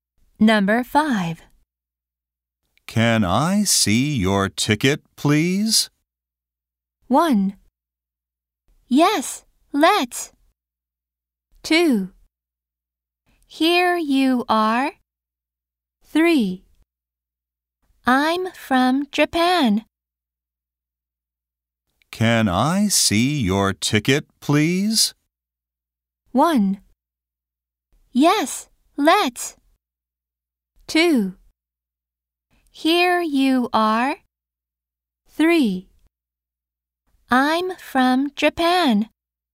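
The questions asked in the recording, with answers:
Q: Can I see your ticket, please?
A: 2: Here you are.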